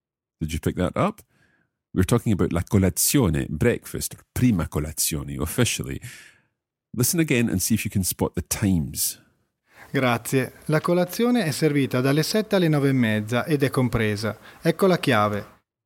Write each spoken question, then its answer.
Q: Listen again and see if you can spot the times.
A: So those times are from 7 o'clock until 9:30.